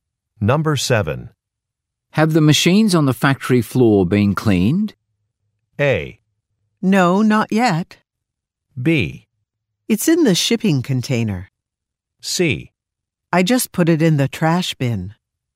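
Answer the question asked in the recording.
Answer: A: No, not yet.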